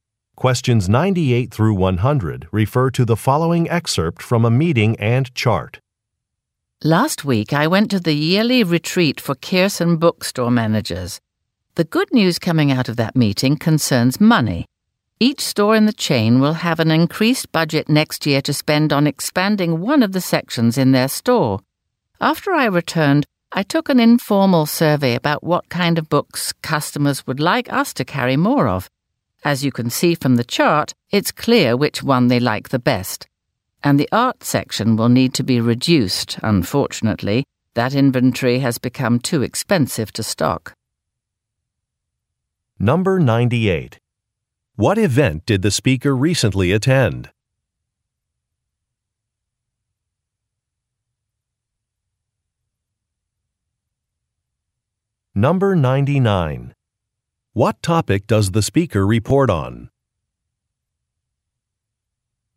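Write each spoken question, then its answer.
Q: What event did the speaker recently attend?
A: A yearly retreat for bookstore managers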